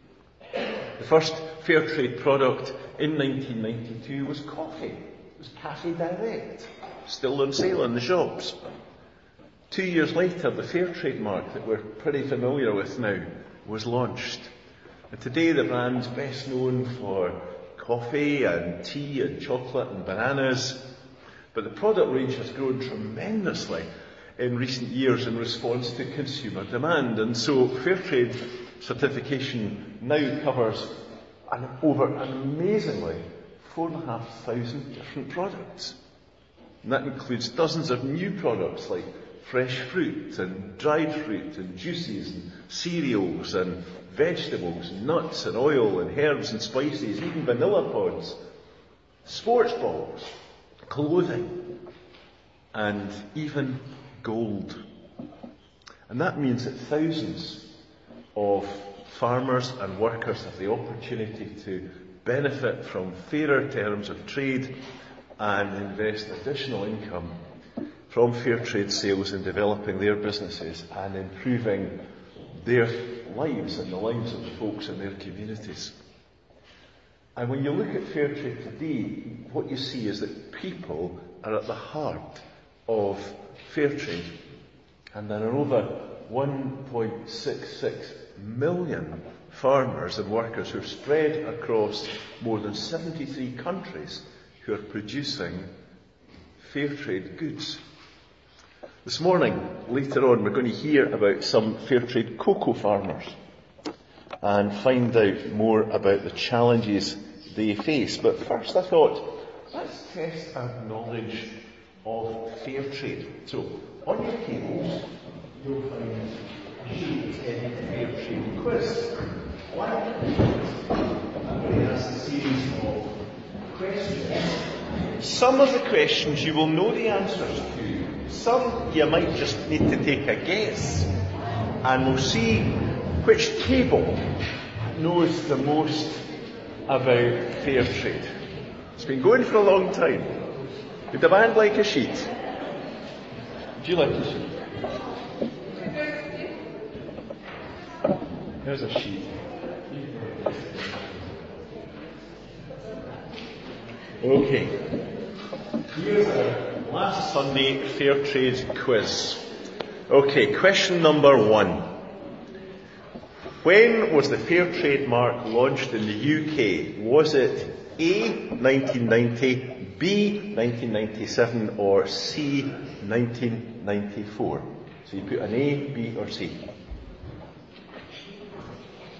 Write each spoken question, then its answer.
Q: When was the fair trade mark launched in the UK?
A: if you have answered C, 1994, you can give yourself 1 point.